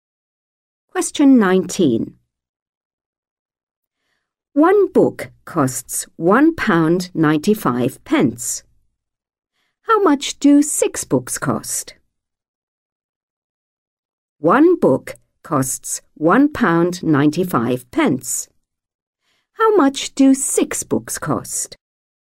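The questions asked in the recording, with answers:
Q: One book costs £1.95. How much do 6 books cost?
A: £11.70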